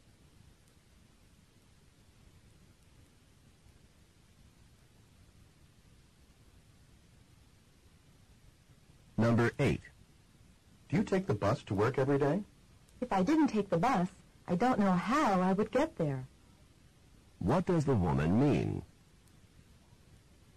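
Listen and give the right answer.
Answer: She takes the bus every day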